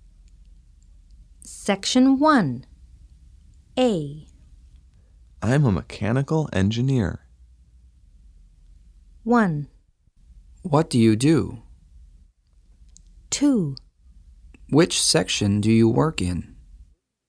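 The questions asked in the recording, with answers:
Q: I'm a mechanical engineer.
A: 1: What do you do?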